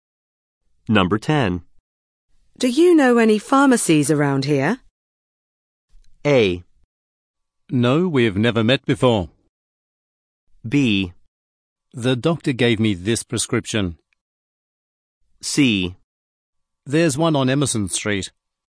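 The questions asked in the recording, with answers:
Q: Do you know any pharmacies around here?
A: C: There's one on Emerson Street.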